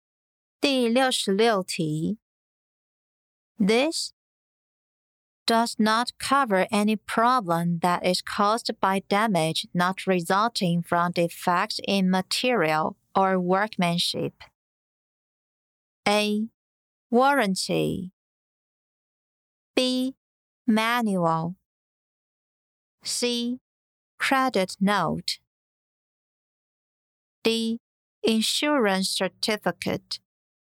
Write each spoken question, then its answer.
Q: This does not cover any problem that is caused by damage not resulting from defects in material or workmanship.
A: 正确答案为 A. Warranty.